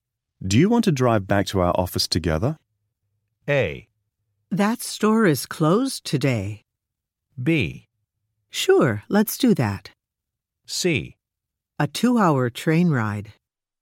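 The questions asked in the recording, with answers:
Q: Do you want to drive back to our office together?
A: B: Sure, let's do that.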